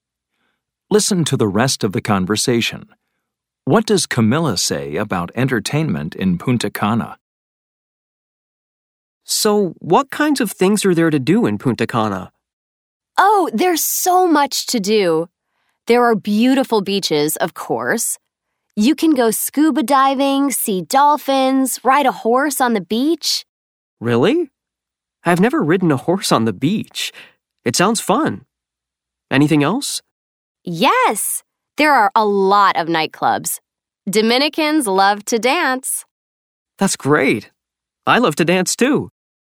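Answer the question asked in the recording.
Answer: There's so much to do: beautiful beaches, scuba diving, seeing dolphins, horse riding on the beach, and a lot of nightclubs (Dominicans love to dance).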